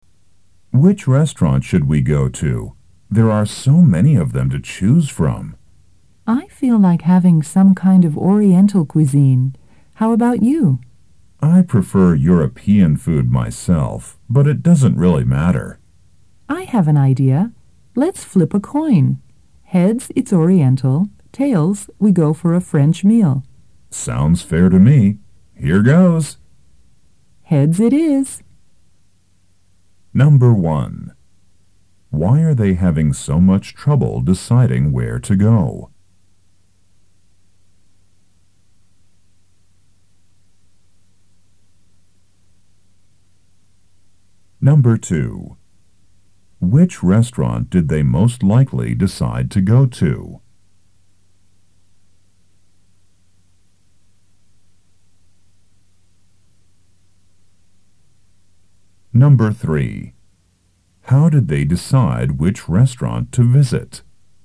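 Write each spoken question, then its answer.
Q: Why are they having so much trouble deciding where to go?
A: There are so many restaurants to choose from

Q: Which restaurant did they most likely decide to go to?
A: An Oriental restaurant

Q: How did they decide which restaurant to visit?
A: By flipping a coin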